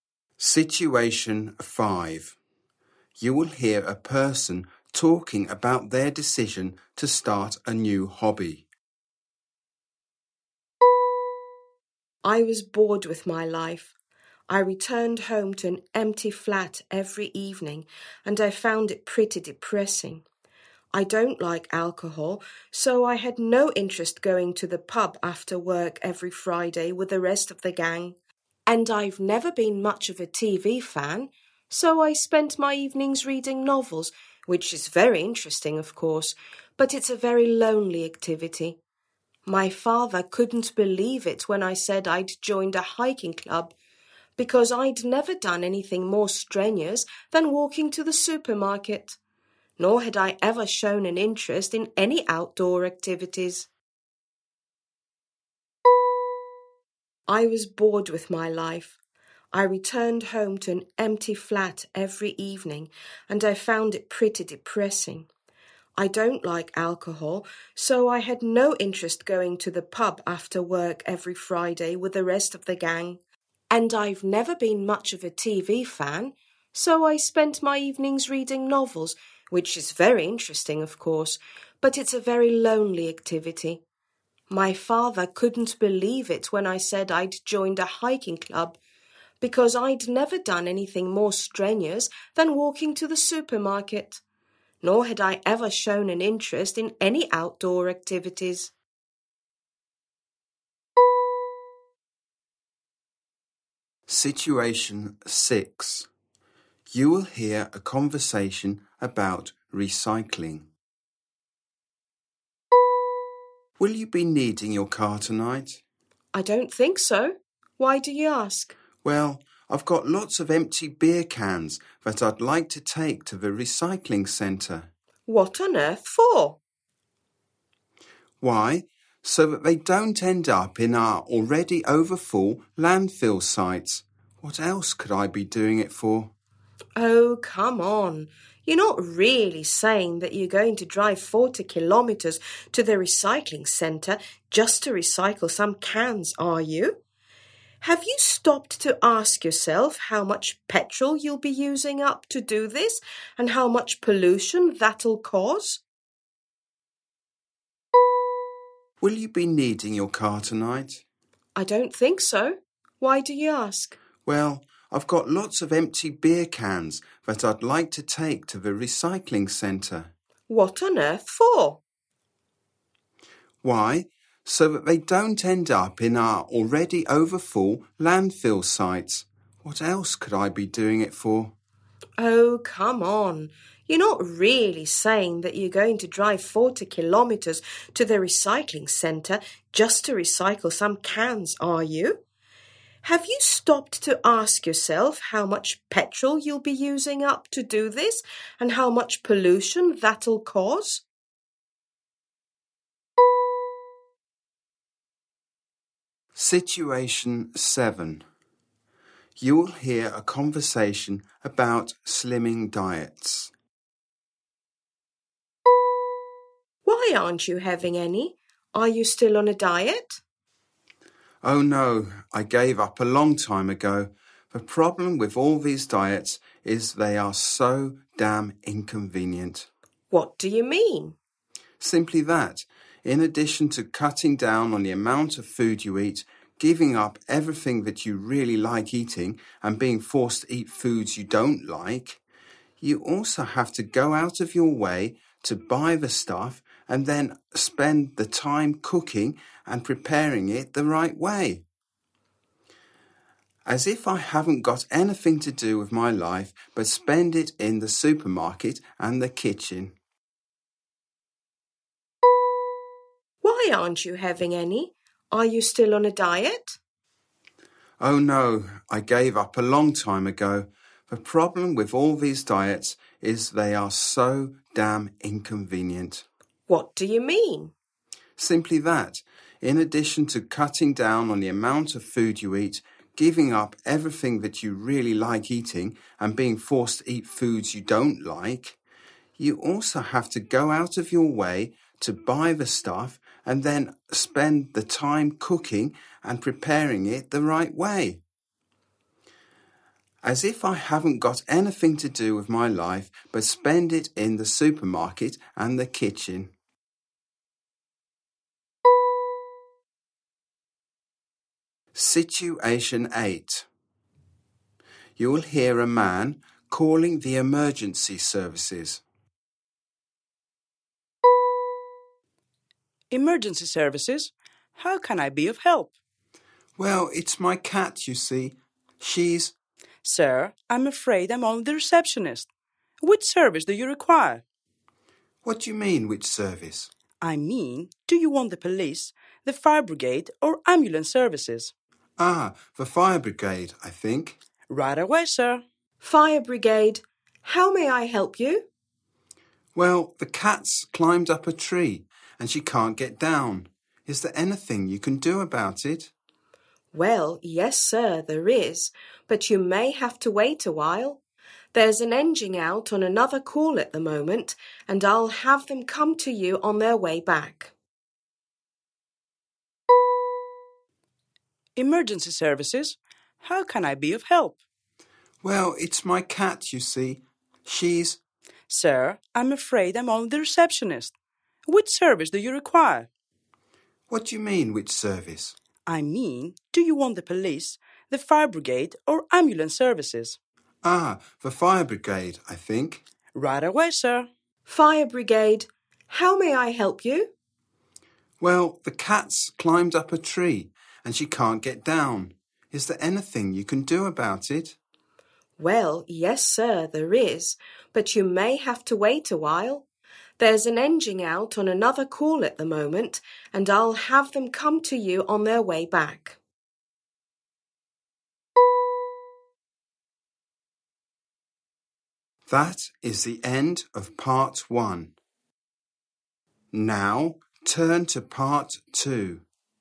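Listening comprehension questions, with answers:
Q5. What motivated them to take it up?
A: Boredom and loneliness

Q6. Why does the woman object to lending the man her car?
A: Driving 40 km would use petrol and cause pollution

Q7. Why is the man complaining?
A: Diets are too inconvenient

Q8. Which service does he require?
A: The fire brigade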